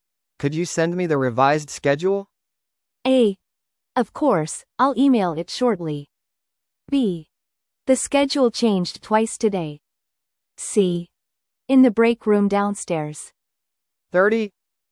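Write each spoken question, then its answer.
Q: Could you send me the revised schedule?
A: A: Of course, I'll email it shortly.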